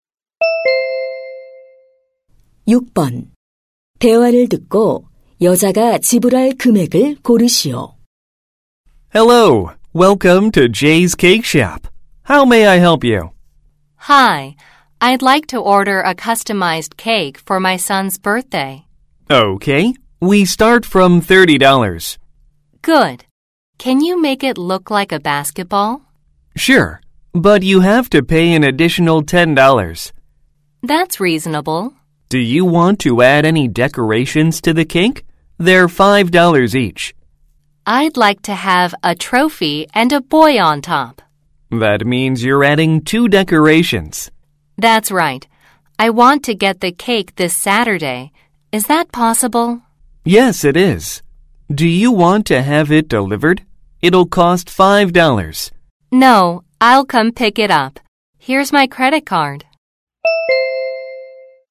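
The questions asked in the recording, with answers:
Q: 대화를 듣고 여자가 지불할 금액을 고르시오.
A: 50달러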